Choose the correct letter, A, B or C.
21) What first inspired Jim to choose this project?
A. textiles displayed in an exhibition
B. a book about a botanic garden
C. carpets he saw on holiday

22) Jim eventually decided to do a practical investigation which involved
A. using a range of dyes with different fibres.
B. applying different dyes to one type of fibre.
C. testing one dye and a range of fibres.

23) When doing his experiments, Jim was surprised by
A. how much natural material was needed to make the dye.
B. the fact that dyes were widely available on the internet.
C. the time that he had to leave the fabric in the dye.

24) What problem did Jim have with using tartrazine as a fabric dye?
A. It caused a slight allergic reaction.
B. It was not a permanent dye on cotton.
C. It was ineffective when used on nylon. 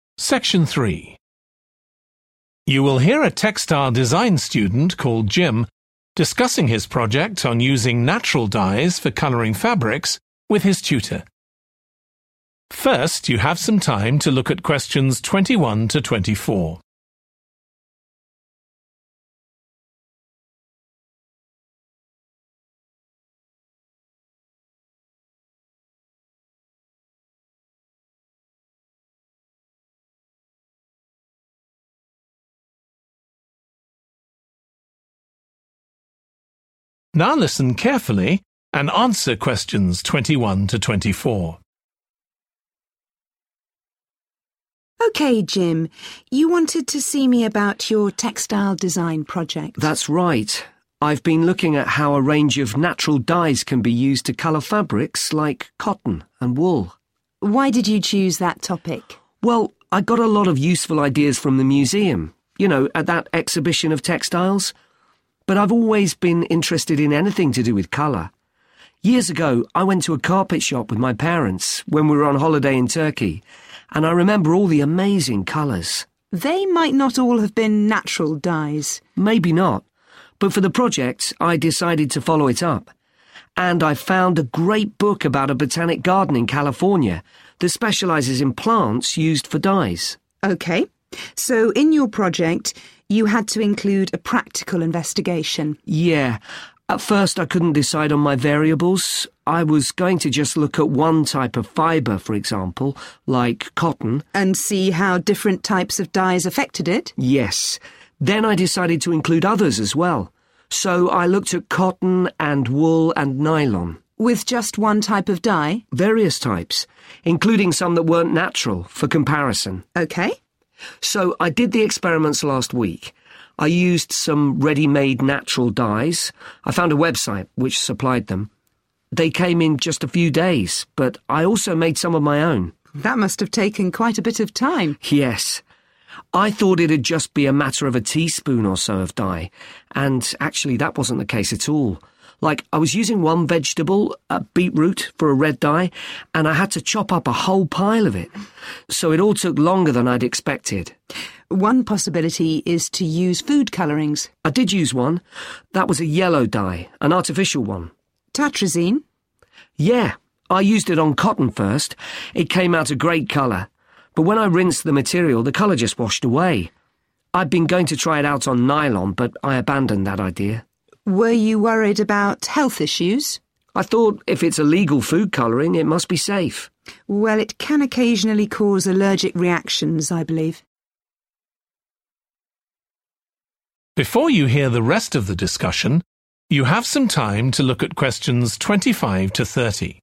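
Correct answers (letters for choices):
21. C
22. A
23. A
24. B

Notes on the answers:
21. Years ago, I went to a carpet shop with my parents when we were on holiday in Turkey [Nhiều năm về trước, em cùng bố mẹ đến một cửa hàng bán thảm khi cả nhà em đi nghỉ ở Thổ Nhĩ Kỳ], and I remember all the amazing colours.
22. Jim: Yes. Then I decided to include others as well, so I looked at cotton and wool and nylon. Tutor: With just one type of dye? Jim: Various types [Jim: Vâng. Sau đó, em quyết định thêm cả những thứ khác nữa, vì vậy em đã thử bông, len và nylon. Gia sư: Chỉ với một loại thuốc nhuộm à? Jim: Nhiều loại ạ]
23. Like I was using one vegetable, beetroot, for a red dye, and I had to chop up a whole pile of it. So it all took longer than I'd expected [Giống như lần em đang sử dụng một loại rau, củ dền ấy ạ, để tạo màu đỏ, và em phải băm nhỏ cả một đống liền. Vì vậy, tất cả mất nhiều thời gian hơn em mong đợi].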